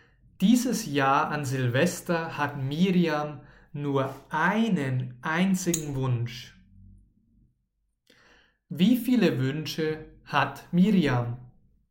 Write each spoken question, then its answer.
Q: Wie viele Wünsche hat Miriam?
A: Nur einen. Sie hat nur einen einzigen Wunsch.